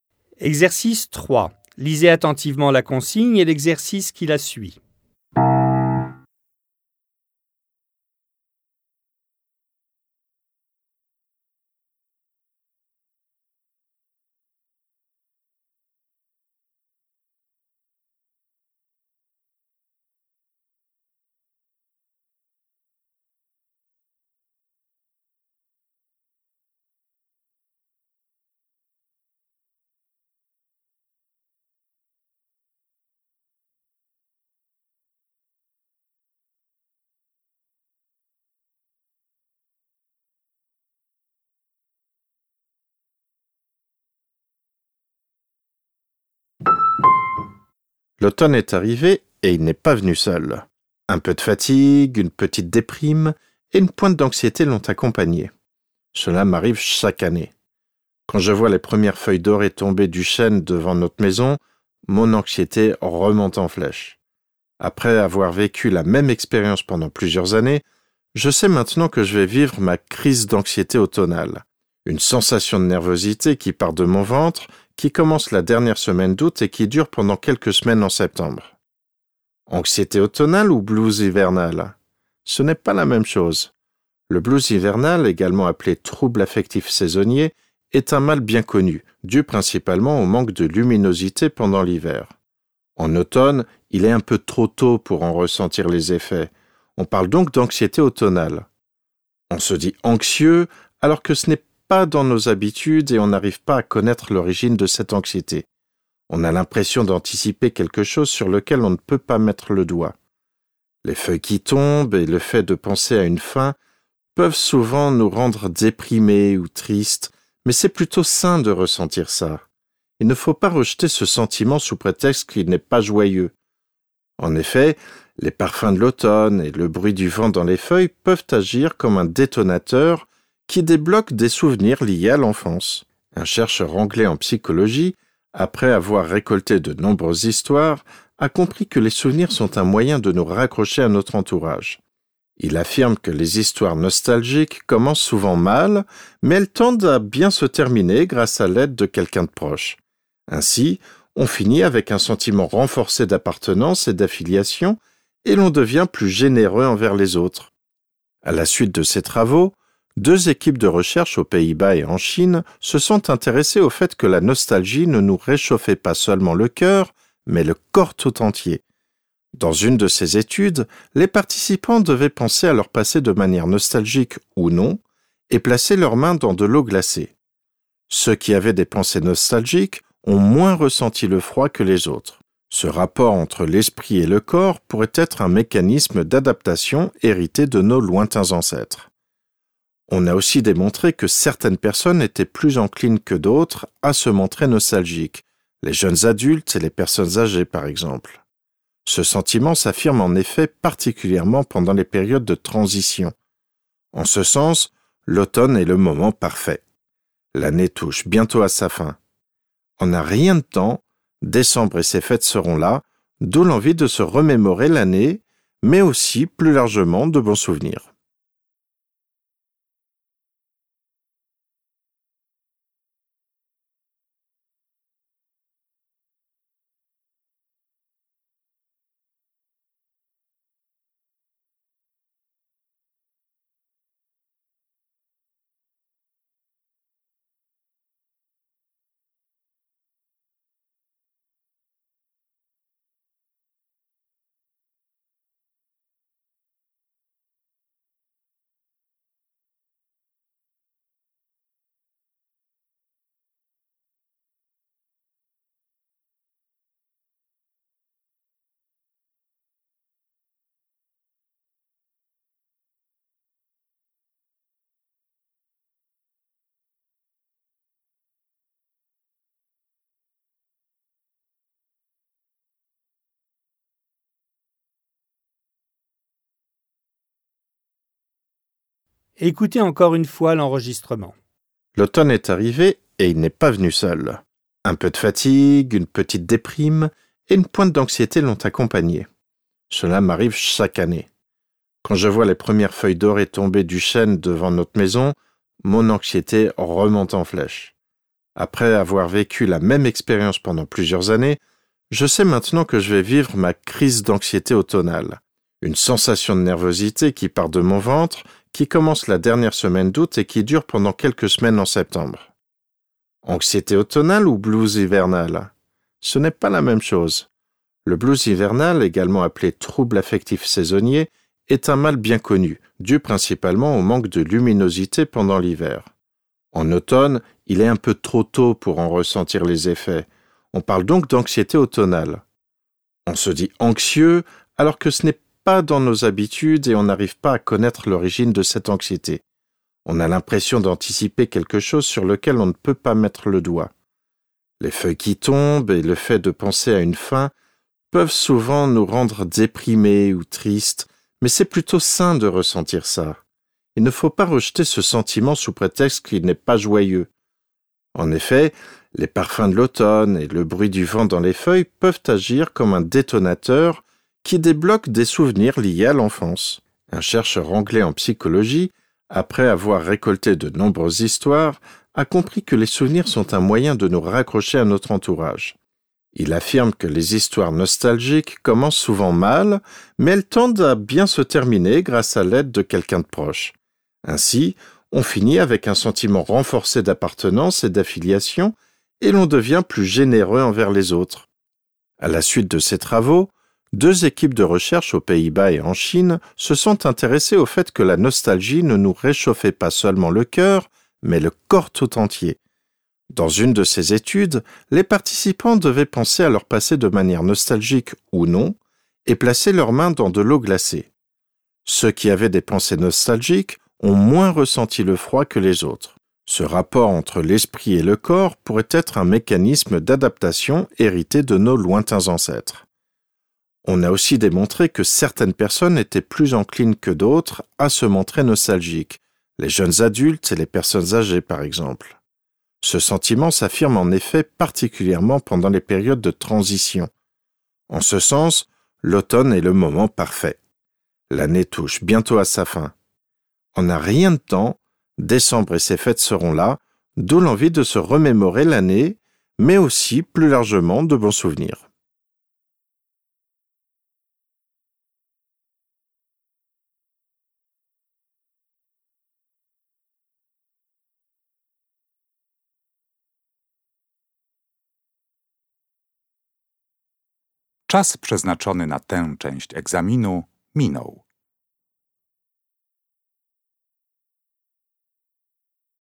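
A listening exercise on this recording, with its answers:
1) L'anxiété automnale dure quelques semaines et ses premiers signes apparaissent chez le narrateur pendant .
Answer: la dernière semaine d'août

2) est à l'origine du blues hivernal.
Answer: Le manque de luminosité pendant l'hiver

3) Selon différents chercheurs contemporains, l'influence de l'esprit sur le corps serait .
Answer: un mécanisme d'adaptation hérité de nos lointains ancêtres

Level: dwujęzyczny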